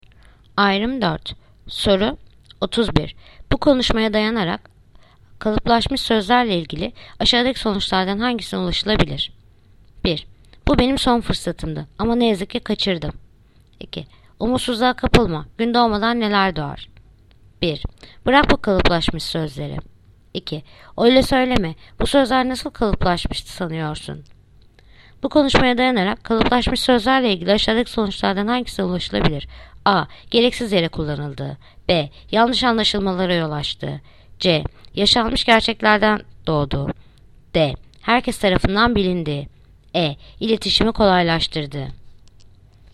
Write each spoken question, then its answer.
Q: Bu konuşmaya dayanarak kalıplaşmış sözlerle ilgili aşağıdaki sonuçlardan hangisine ulaşılabilir?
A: Yanıt: Ceyhan. Yaşanmış gerçeklerden doğdu.